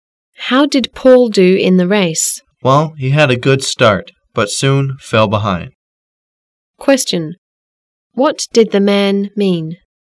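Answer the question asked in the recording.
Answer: Paul started well but soon fell behind in the race.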